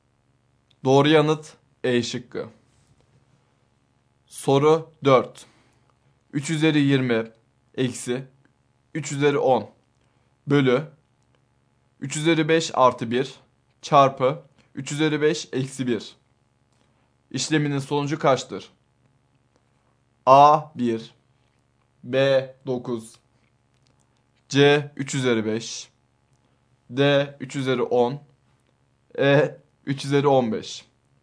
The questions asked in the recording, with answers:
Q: İşleminin sonucu kaçtır?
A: Doğru yanıt D şıkkı.